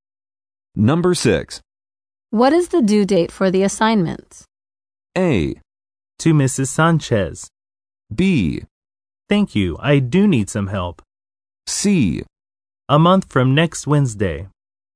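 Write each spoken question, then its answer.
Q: What is the due date for the assignment?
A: C: A month from next Wednesday.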